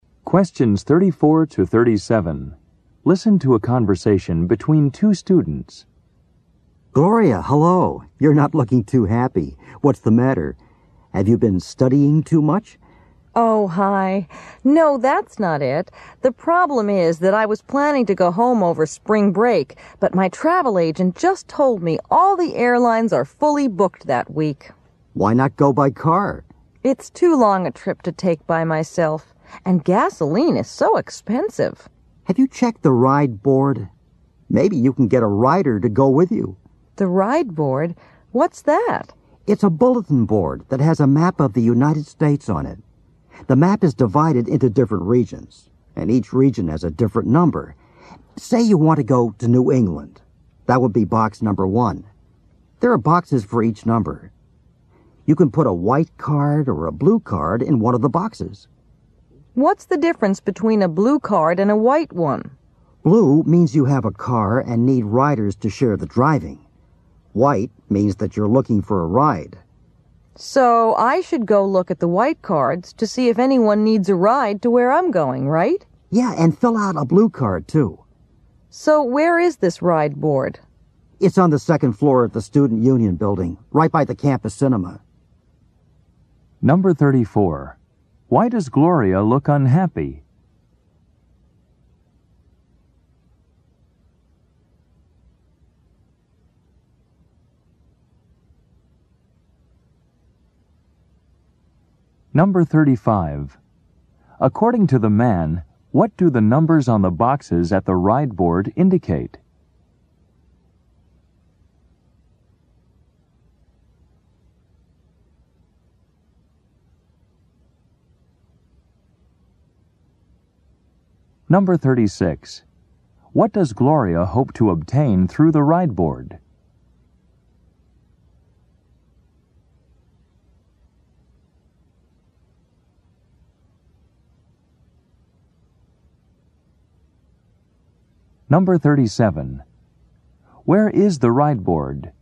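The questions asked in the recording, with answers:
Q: Why does Gloria look unhappy?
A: She can't get a flight home for spring break; the airlines are fully booked

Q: According to the man, what do the numbers on the boxes at the ride board indicate?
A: Different regions of the United States

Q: Where is the ride board?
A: On the second floor of the Student Union building, by the campus cinema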